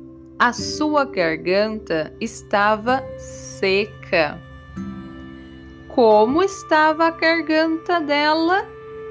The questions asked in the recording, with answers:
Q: Como estava a garganta dela?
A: Seca. A garganta dela estava seca.